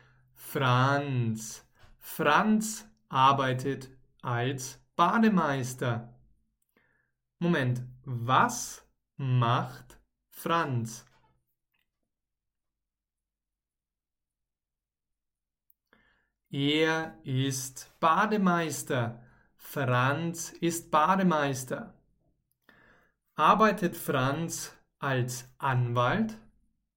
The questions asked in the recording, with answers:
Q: Arbeitet Franz als Anwalt?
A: Nein. Franz arbeitet nicht als Anwalt.